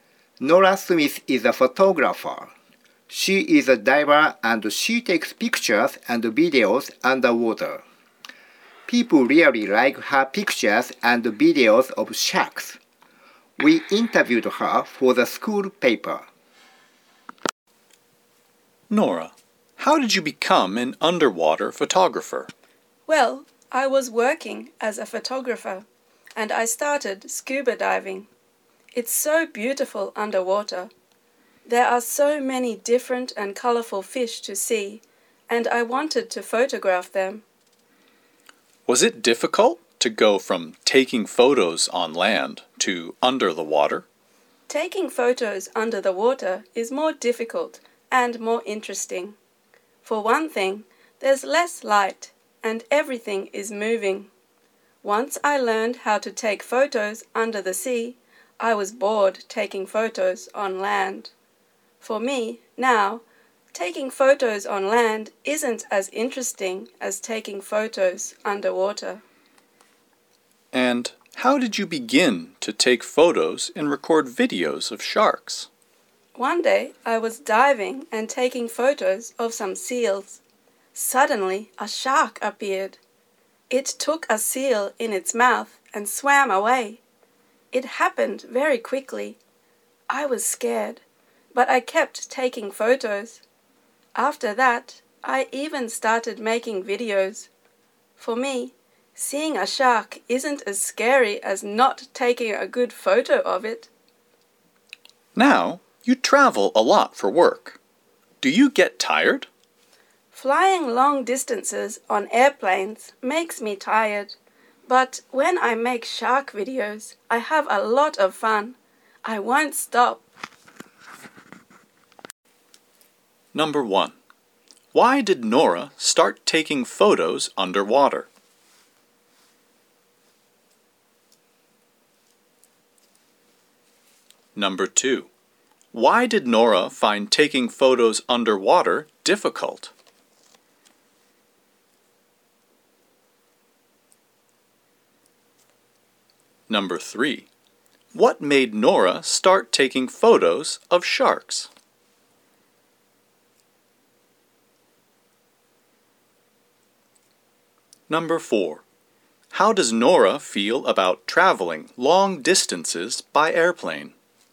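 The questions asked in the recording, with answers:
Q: Why did Nora start taking photos underwater?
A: She started scuba diving and wanted to photograph the many colorful fish underwater.

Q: Why did Nora find taking photos underwater difficult?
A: There is less light and everything is moving.

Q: What made Nora start taking photos of sharks?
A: While she was photographing seals, a shark suddenly appeared and took a seal.

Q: How does Nora feel about traveling long distances by airplane?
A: It makes her tired.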